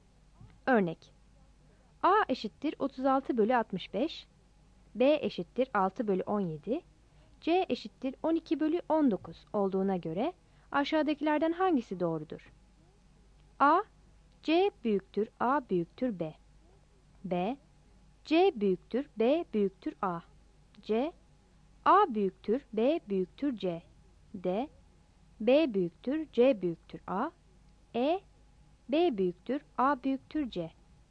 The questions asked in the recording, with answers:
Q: A eşittir 36 bölü 65, B eşittir 6 bölü 17, C eşittir 12 bölü 19 olduğuna göre aşağıdakilerden hangisi doğrudur?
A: Yani C büyüktür A büyüktür B'dir.